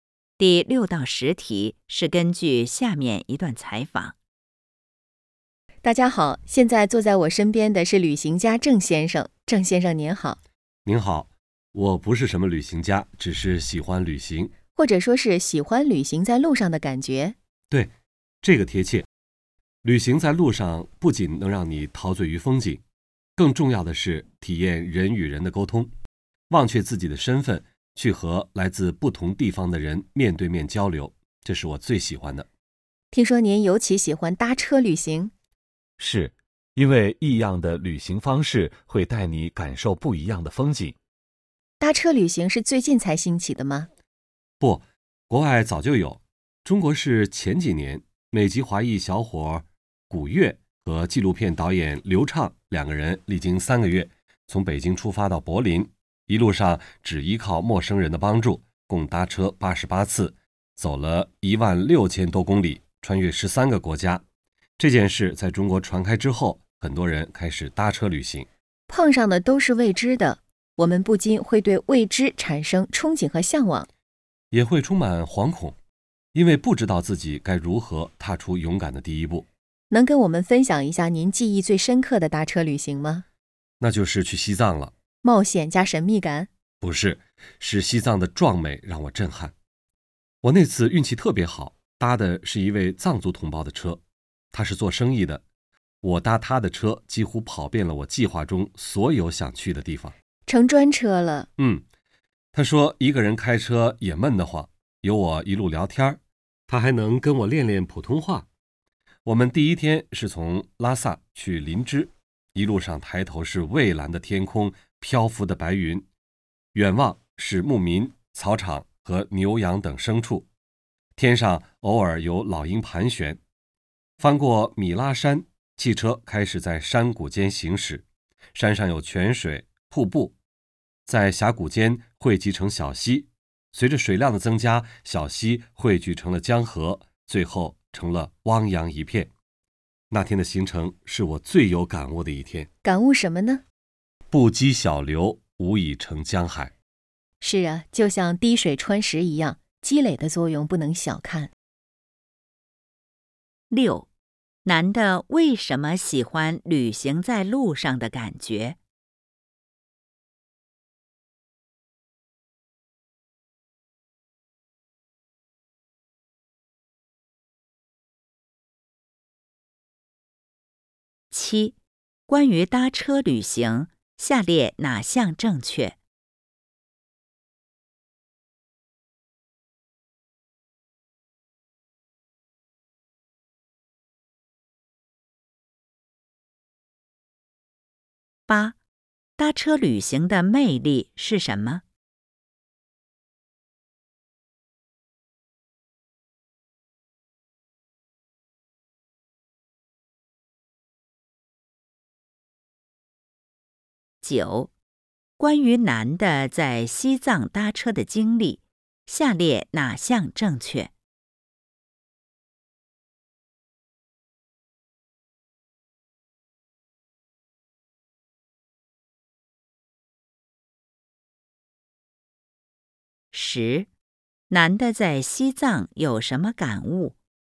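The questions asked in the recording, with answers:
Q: 男的为什么喜欢旅行在路上的感觉?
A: 能体验人与人的沟通,和来自不同地方的人面对面交流

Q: 男的在西藏有什么感悟?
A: 不积小流,无以成江海,积累的作用不能小看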